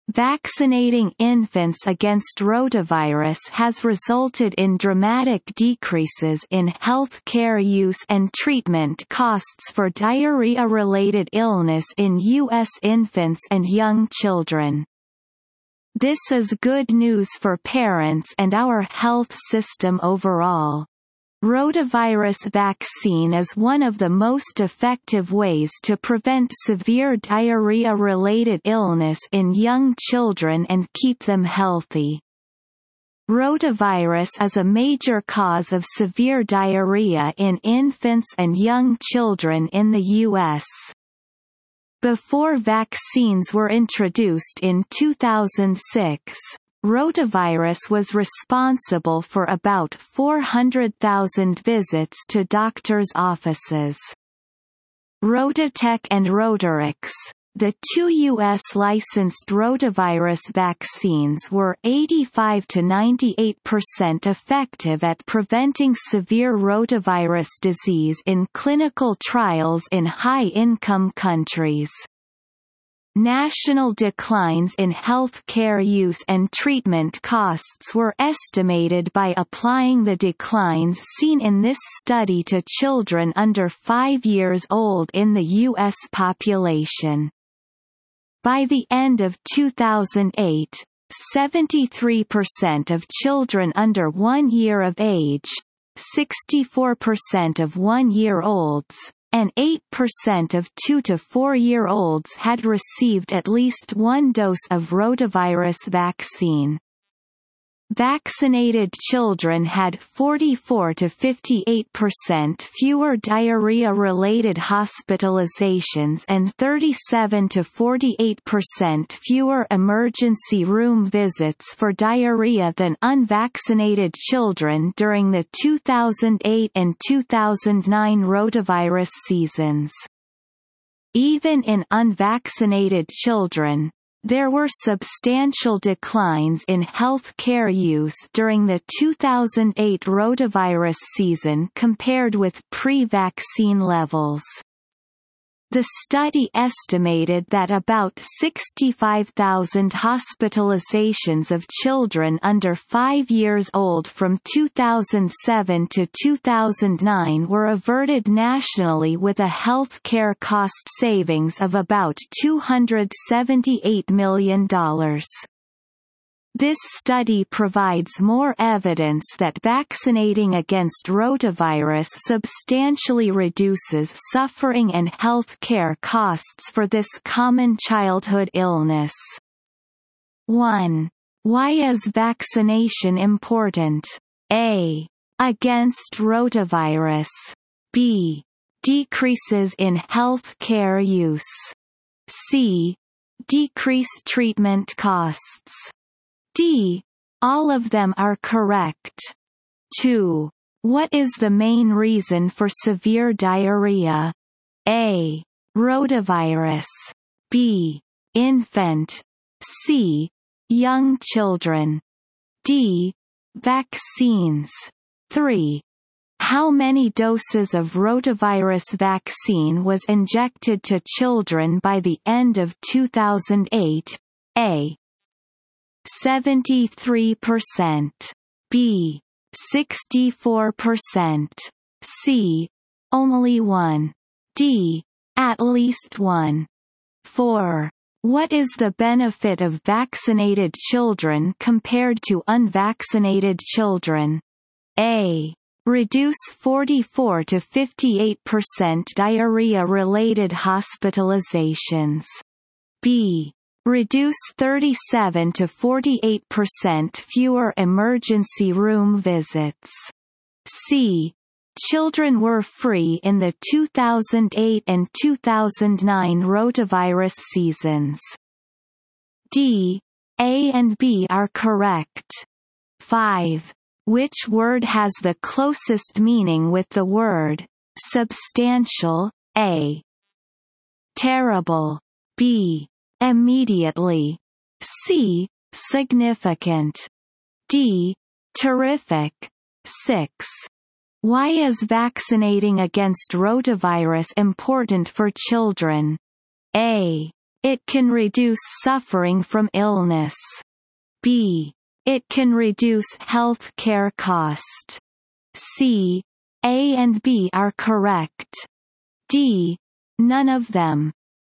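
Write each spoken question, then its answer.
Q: What is the main reason for severe diarrhea?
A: A: Rotavirus.

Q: How many doses of rotavirus vaccine was injected to children by the end of 2008?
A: D: At least 1.

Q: What is the benefit of vaccinated children compared to unvaccinated children?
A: D: A and B are correct.

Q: Which word has the closest meaning with the word substantial?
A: C: Significant.

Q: Why is vaccinating against rotavirus important for children?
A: C: A and B are correct.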